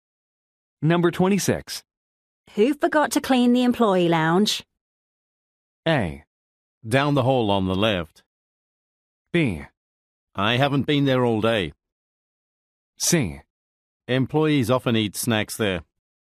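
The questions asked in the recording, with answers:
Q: Who forgot to clean the employee lounge?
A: B: I haven't been there all day.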